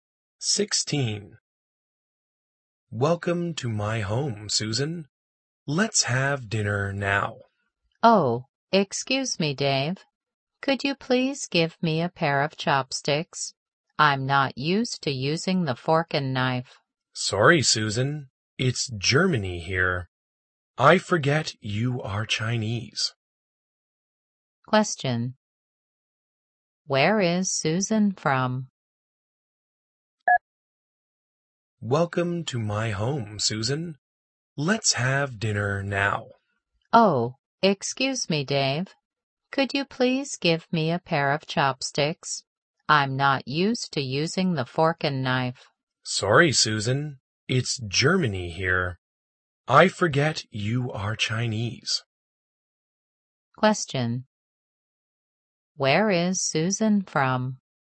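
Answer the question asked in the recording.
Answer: China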